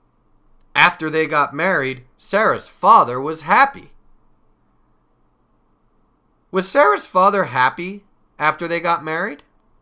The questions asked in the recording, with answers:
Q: Was Sarah's father happy after they got married?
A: Yes, he was. He was happy.